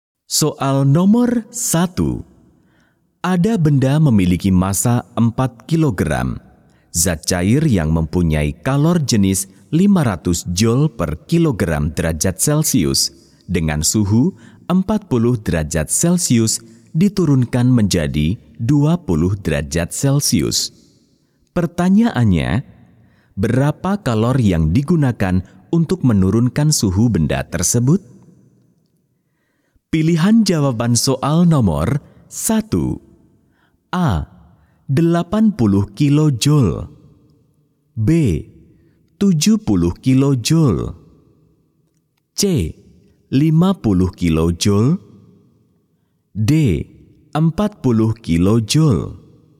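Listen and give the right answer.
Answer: D: 40 kilojoule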